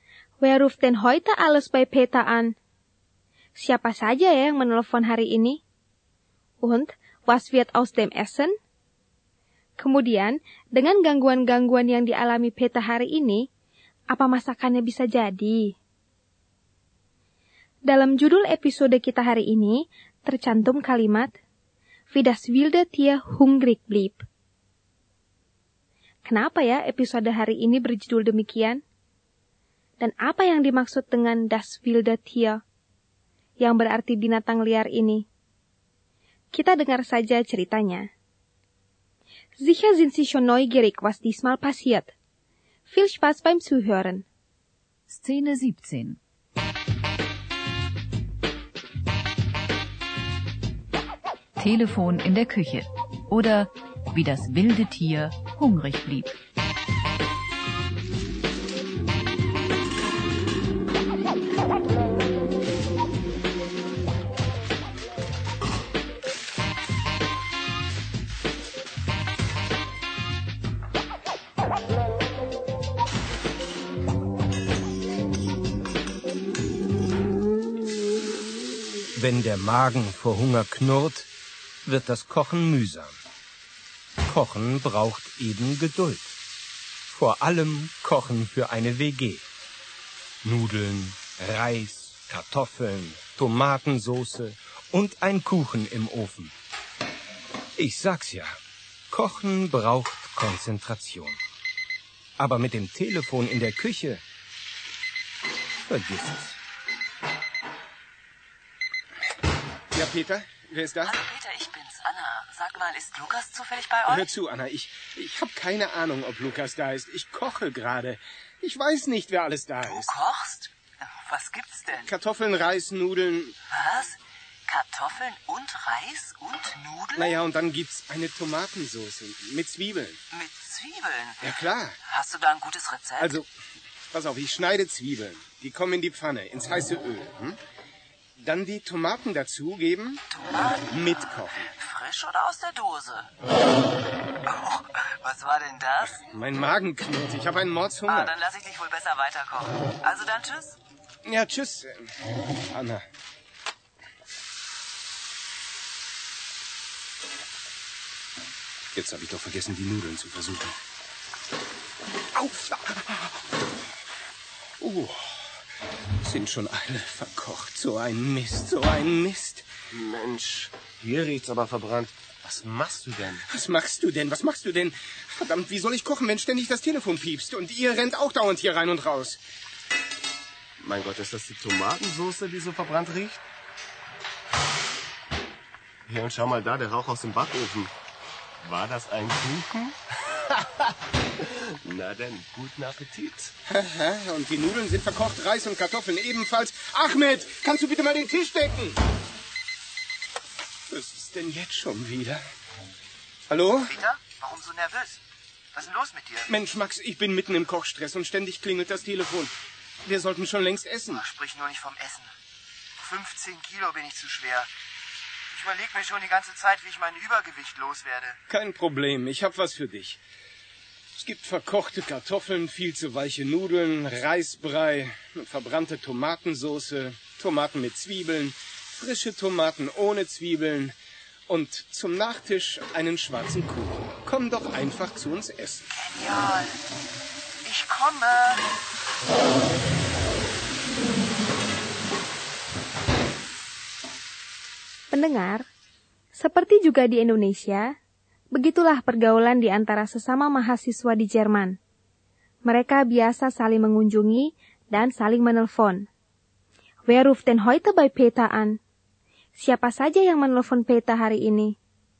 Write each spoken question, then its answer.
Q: Wer ruft denn heute bei Peter an?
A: Zuerst ruft Anna an. Sie fragt nach Lukas. Und dann Max, der gleich auch essen will.